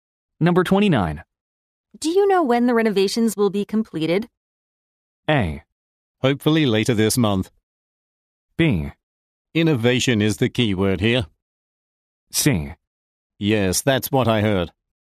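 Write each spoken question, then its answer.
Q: you know when the renovations will be completed?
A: A: Hopefully later this month.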